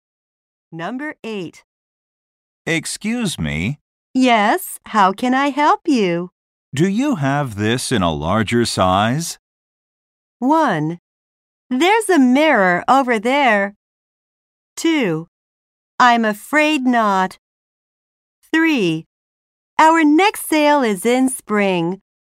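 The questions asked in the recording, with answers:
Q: Do you have this in a larger size?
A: 2: I'm afraid not.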